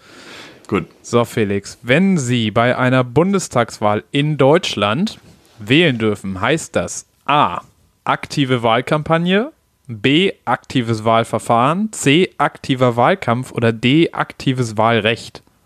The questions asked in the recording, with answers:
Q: So, Felix, wenn Sie bei einer Bundestagswahl in Deutschland wählen dürfen, heißt das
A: Ja, auf jeden Fall D.